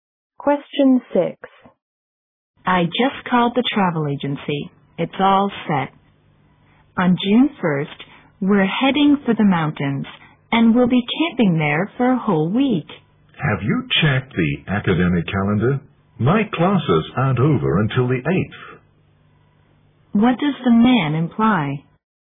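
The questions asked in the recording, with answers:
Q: What does the man imply?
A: He can't go camping on June 1st because his classes don't end until the 8th.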